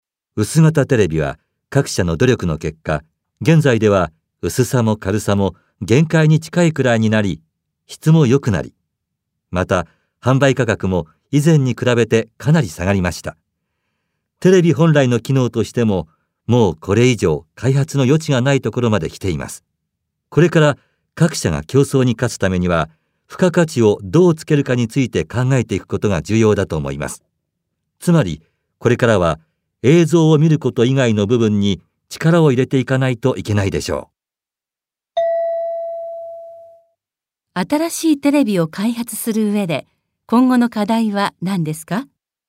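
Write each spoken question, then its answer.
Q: 新しいテレビを開発する上で、今後の課題は何ですか?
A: 映像を見ること以外の付加価値をどうつけるか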